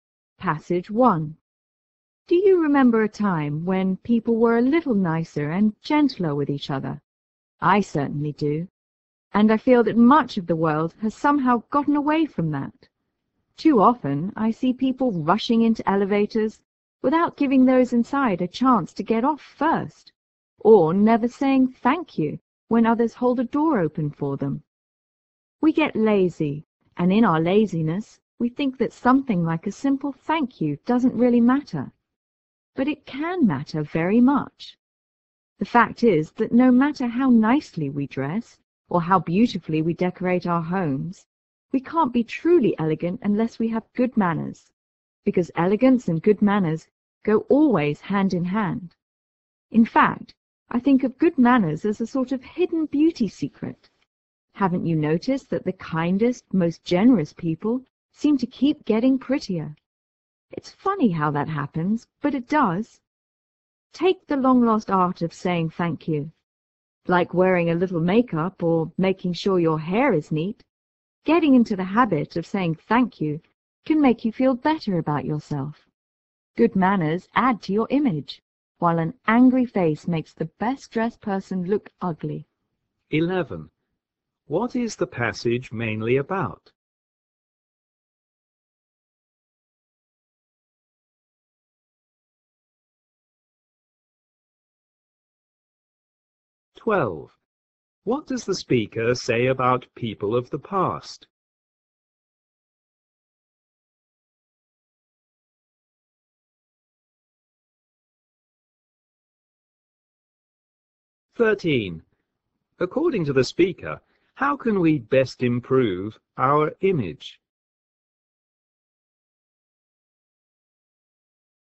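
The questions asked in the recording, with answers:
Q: What is the passage mainly about?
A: The importance of good manners.

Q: What does the speaker say about people of the past?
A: They were nicer and gentler with each other.

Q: According to the speaker, how can we best improve our image?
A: By having good manners, such as saying thank you.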